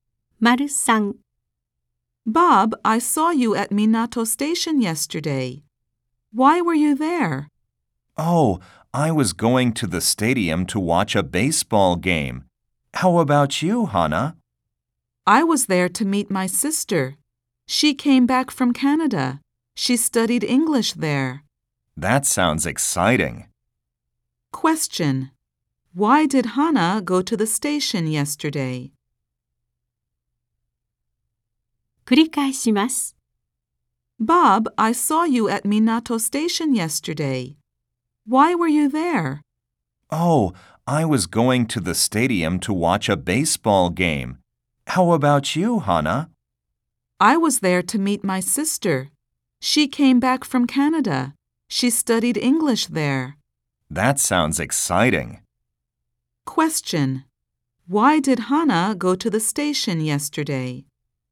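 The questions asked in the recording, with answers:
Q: Why did Hana go to the station yesterday?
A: To meet her sister who came back from Canada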